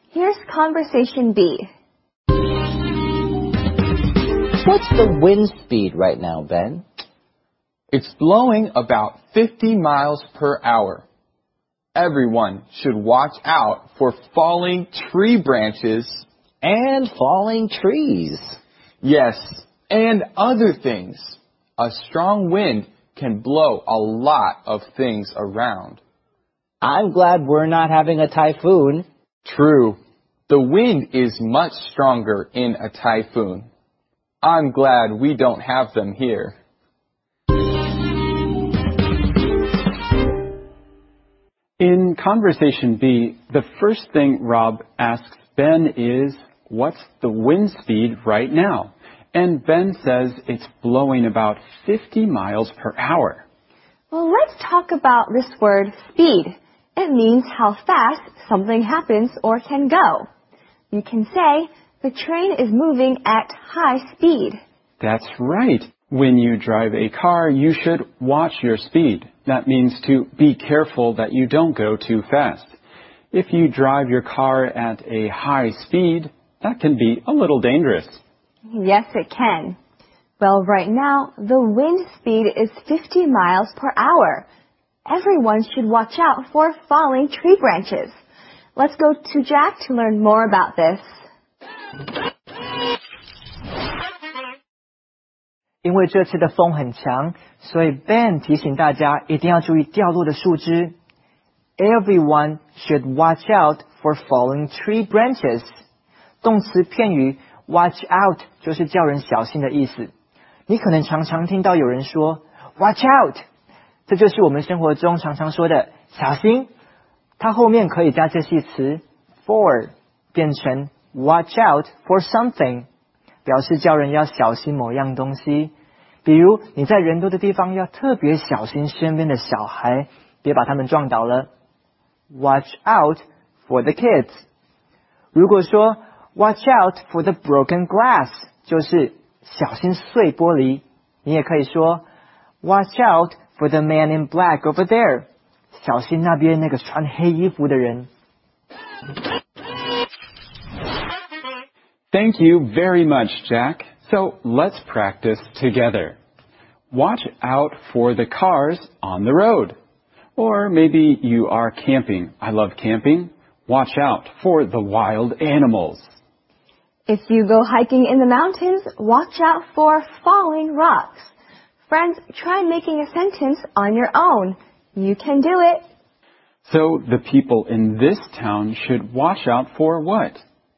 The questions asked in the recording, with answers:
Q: So the people in this town should watch out for what?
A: That's right, falling tree branches.